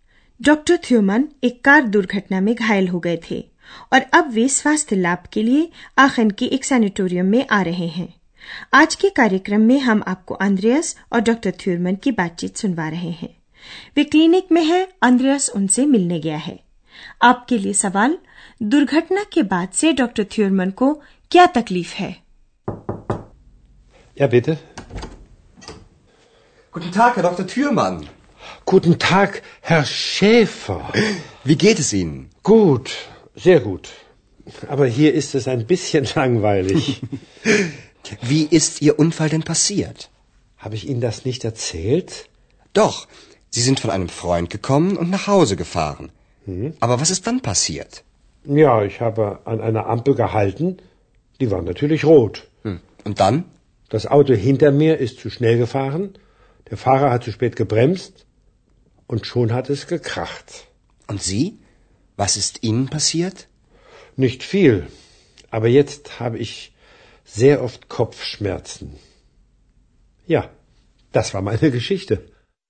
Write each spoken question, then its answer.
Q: दुर्घटना के बाद से doctor थ्यूरमन को क्या तकलीफ है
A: तो doctor थ्यूरमन को दुर्घटना के बाद से अक्सर सर रहता है